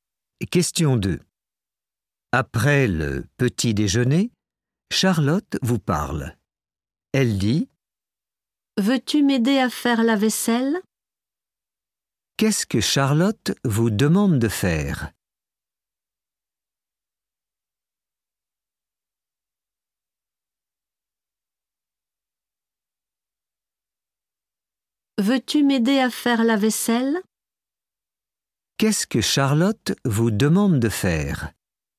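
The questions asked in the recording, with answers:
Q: Qu'est-ce que Charlotte vous demande de faire ?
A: L'aider à faire la vaisselle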